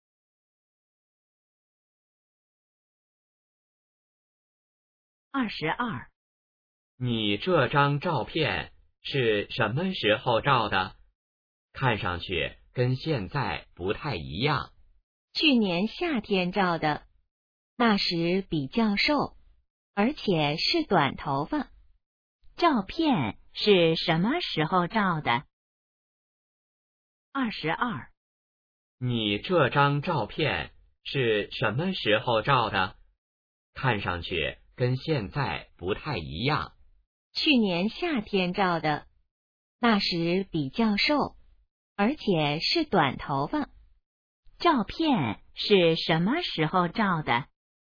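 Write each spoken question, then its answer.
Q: 照片是什么时候照的?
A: 去年夏天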